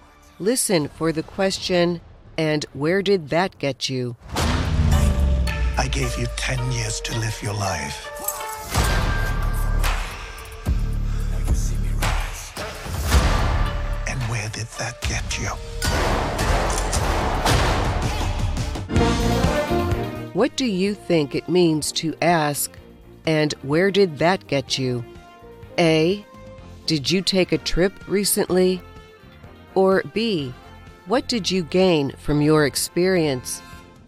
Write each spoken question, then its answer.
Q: What do you think it means to ask, and where did that get you?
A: The answer is B. And where did that get you is the same as asking, what did you gain from your experience?